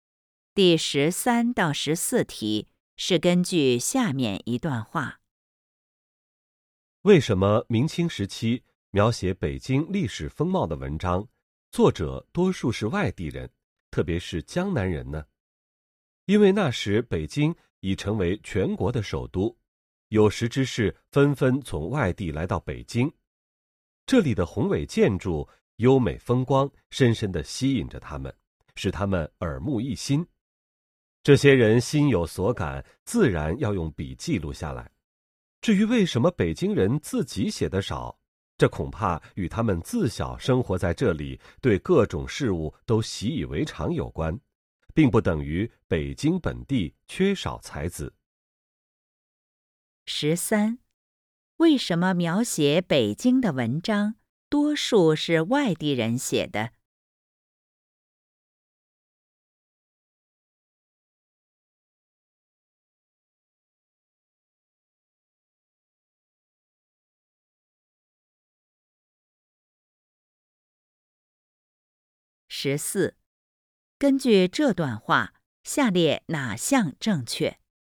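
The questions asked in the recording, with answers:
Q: 为什么描写北京的文章,多数是外地人写的?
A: 北京的宏伟建筑和优美风光吸引了外地人,使他们耳目一新,于是写下来;北京人对这些习以为常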